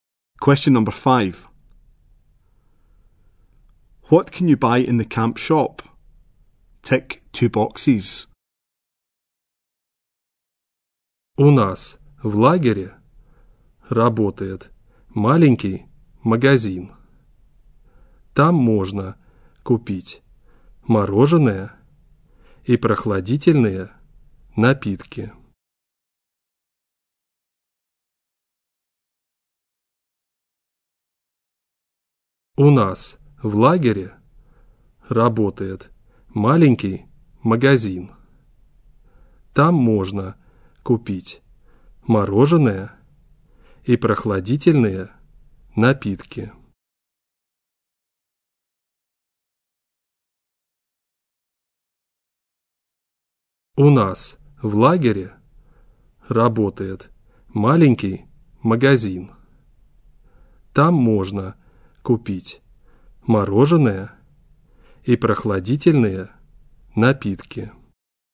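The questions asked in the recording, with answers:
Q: What can you buy in the camp shop?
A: Ice cream and cold drinks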